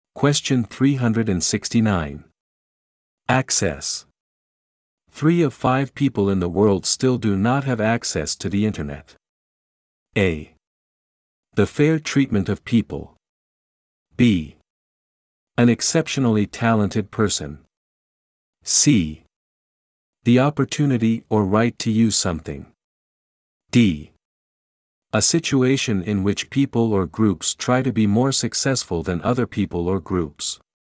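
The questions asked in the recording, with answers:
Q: Access. 3 of 5 people in the world still do not have access to the internet.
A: C: The opportunity or right to use something.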